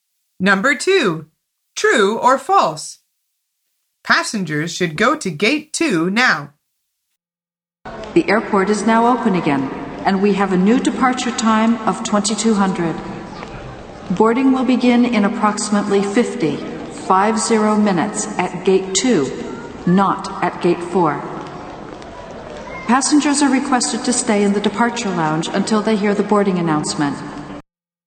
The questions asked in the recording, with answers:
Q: Passengers should go to gate two now.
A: The answer is false.